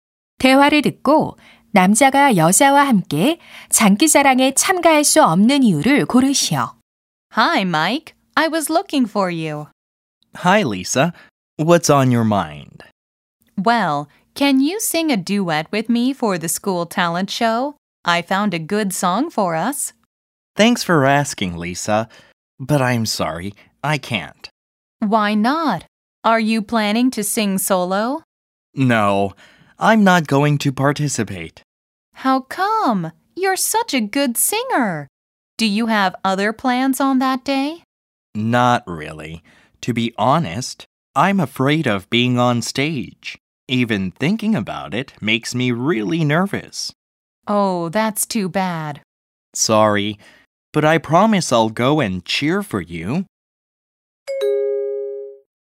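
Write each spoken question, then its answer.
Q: 대화를 듣고 남자가 여자와 함께 장기자랑에 참가할 수 없는 이유를 고르시오.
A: 무대에 서는 것이 두려워서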